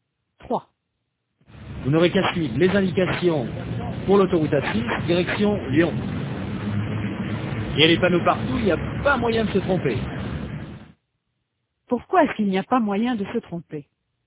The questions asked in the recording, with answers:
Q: Pourquoi est-ce qu'il n'y a pas moyen de se tromper?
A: Parce qu'il y a des panneaux partout.